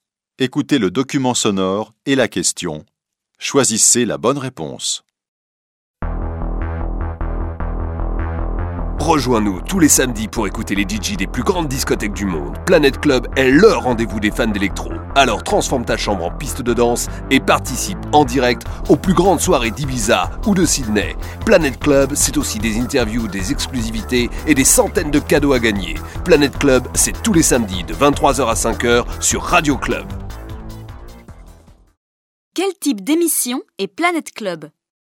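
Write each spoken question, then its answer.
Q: Quel type d'émission est Planet Club ?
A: Une émission de radio de musique électro (DJ)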